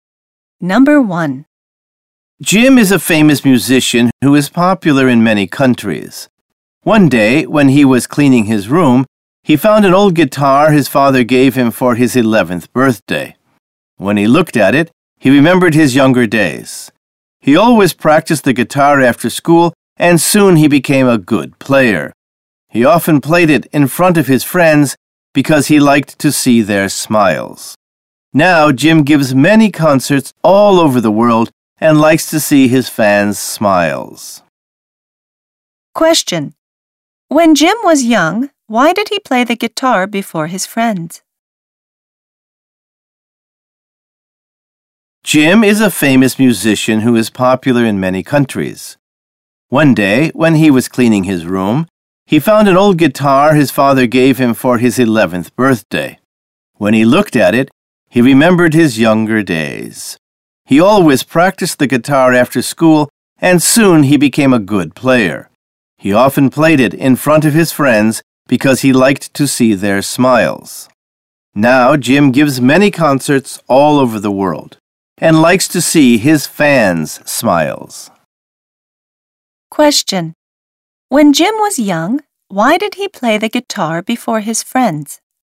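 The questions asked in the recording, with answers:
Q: When Jim was young, why did he play the guitar before his friends?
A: Because he liked to see their smiles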